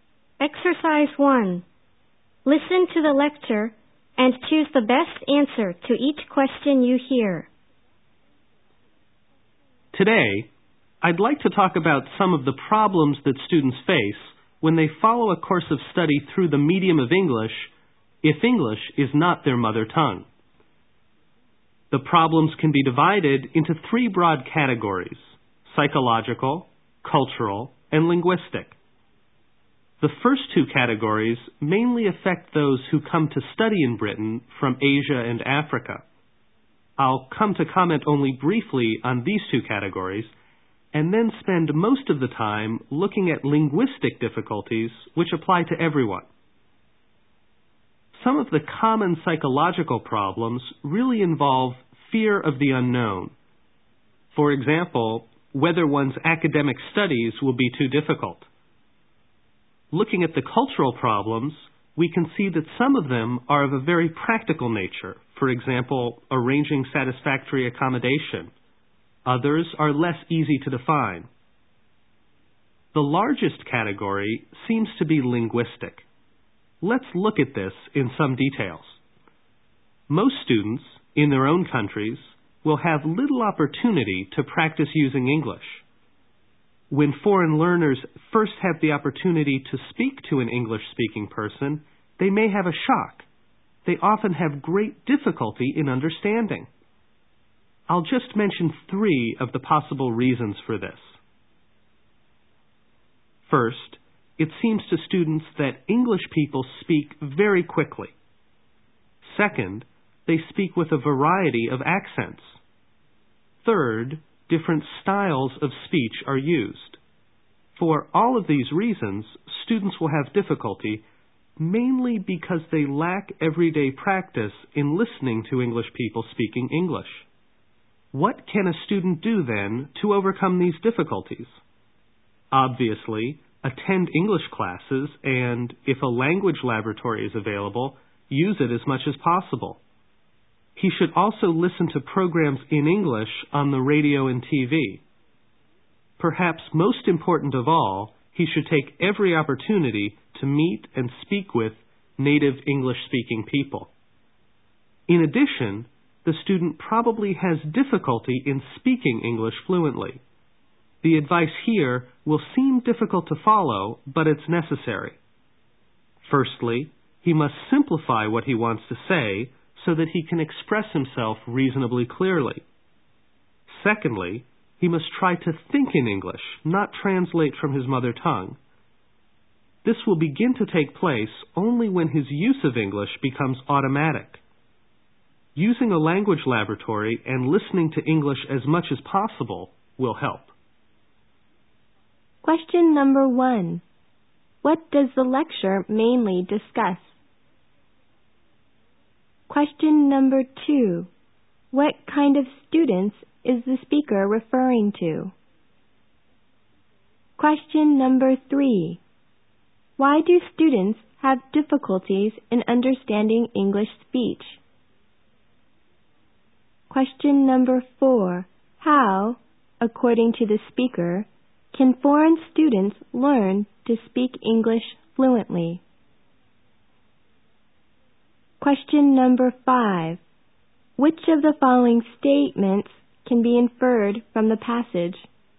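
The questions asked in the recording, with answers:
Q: What does the lecture mainly discuss?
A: Problems foreign students face studying through the medium of English

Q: What kind of students is the speaker referring to?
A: Students whose mother tongue is not English studying in English

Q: Why do students have difficulties in understanding English speech?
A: They lack everyday practice listening to English people speaking English

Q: How, according to the speaker, can foreign students learn to speak English fluently?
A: By simplifying what they say and thinking in English, not translating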